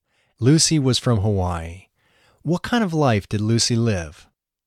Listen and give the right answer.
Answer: Lucy lived a normal life.